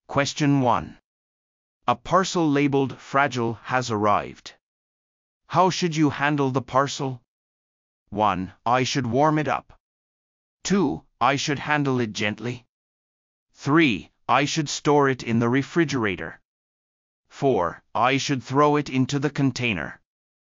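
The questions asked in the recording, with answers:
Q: How should you handle the parcel?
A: 2: I should handle it gently.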